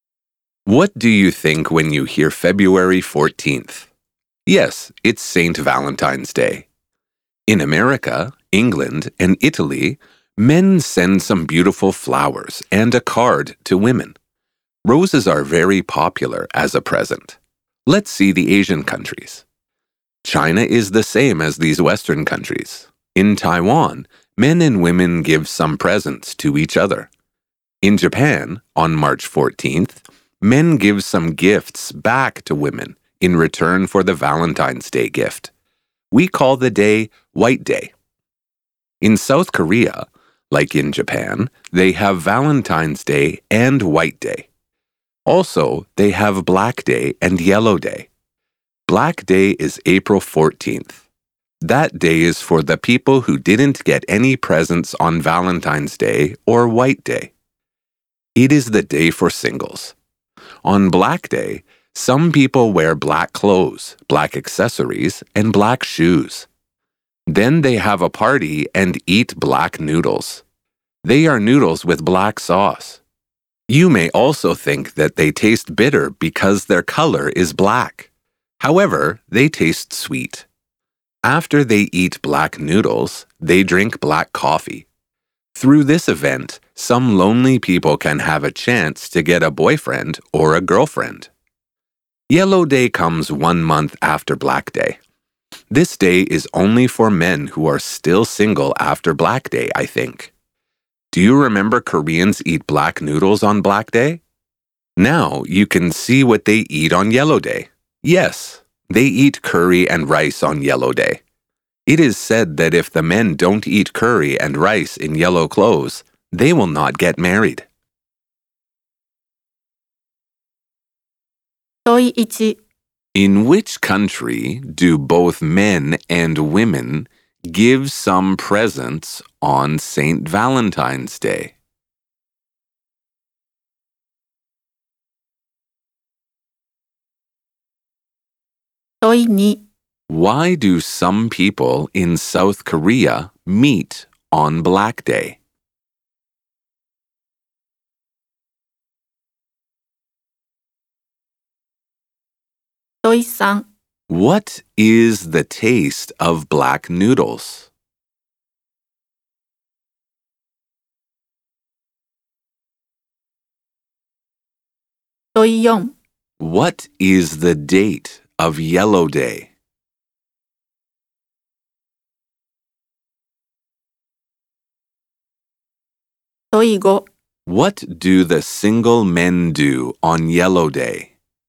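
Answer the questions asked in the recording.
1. Taiwan
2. Because they didn't get presents on Valentine's Day or White Day; to have a chance to get a boyfriend or girlfriend
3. Sweet
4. May 14th
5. They eat curry and rice in yellow clothes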